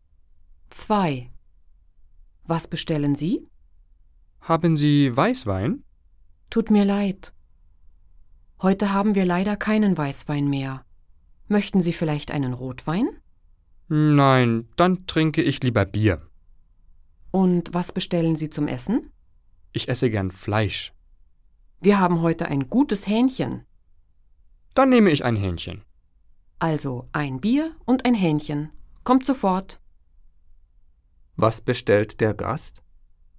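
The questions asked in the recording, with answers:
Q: Was bestellt der Gast?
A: Ein Bier und ein Hähnchen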